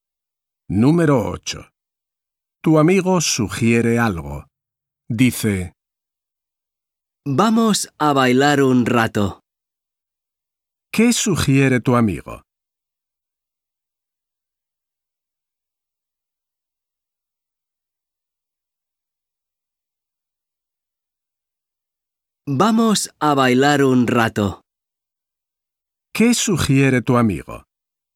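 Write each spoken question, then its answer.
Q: ¿Qué sugiere tu amigo?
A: bailar un rato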